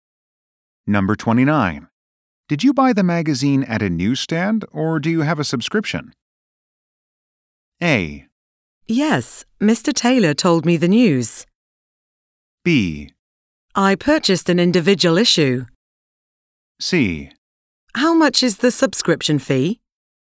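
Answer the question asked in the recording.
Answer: B: I purchased an individual issue.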